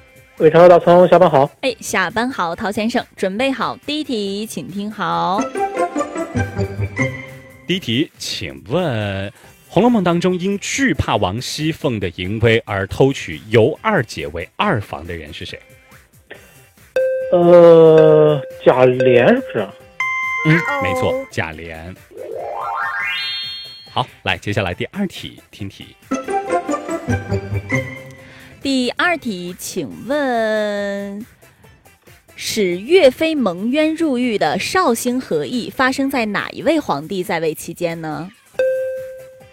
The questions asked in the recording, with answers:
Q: 请问《红楼梦》当中因惧怕王熙凤的淫威而偷取尤二姐为二房的人是谁?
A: 嗯,没错,贾琏。